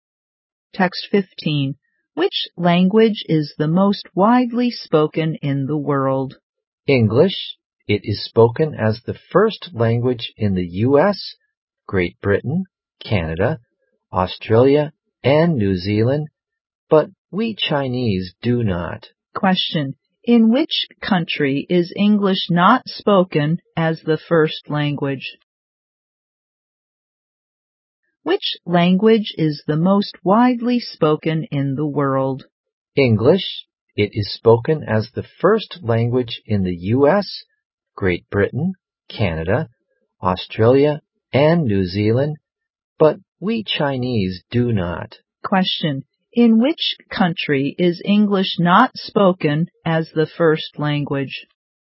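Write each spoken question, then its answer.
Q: In which country is English not spoken as the first language?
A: China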